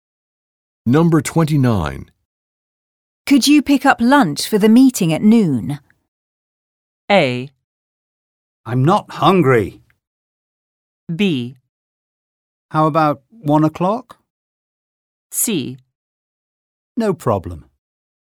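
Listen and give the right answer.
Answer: C: No problem.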